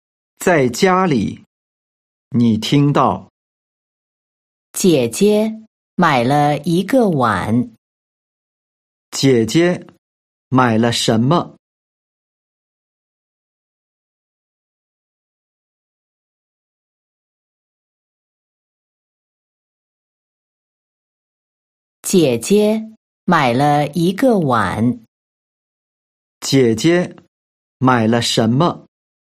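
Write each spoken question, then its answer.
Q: 姐姐买了什么?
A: 一个碗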